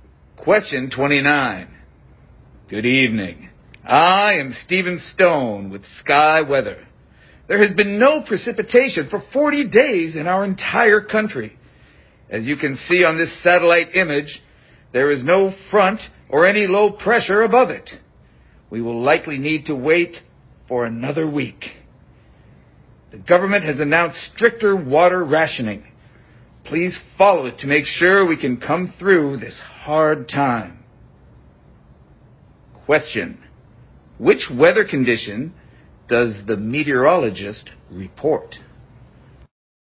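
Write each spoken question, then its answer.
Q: which weather condition does the meteorologist report?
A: A drought: no rain for 40 days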